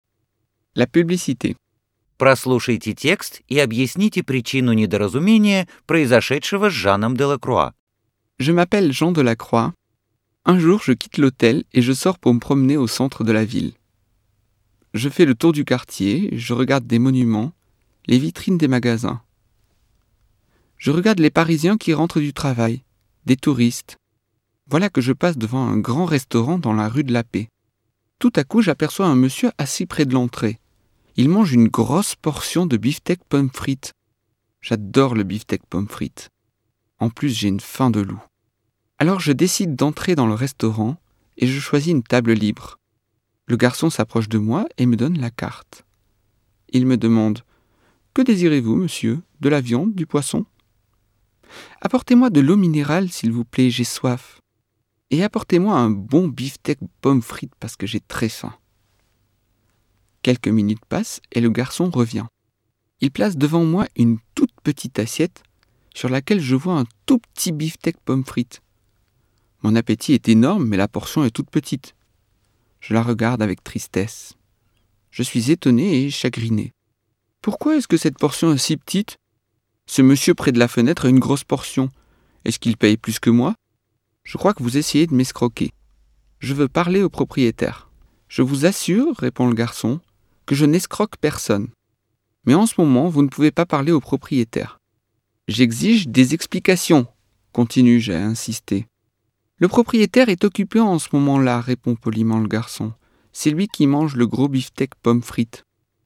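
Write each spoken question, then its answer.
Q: Прослушайте текст и объясните причину недоразумения, произошедшего с Жаном Делакруа.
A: Мужчина с большой порцией бифштекса у входа был владельцем ресторана: он ел её как рекламу, а клиентам подавали маленькие порции.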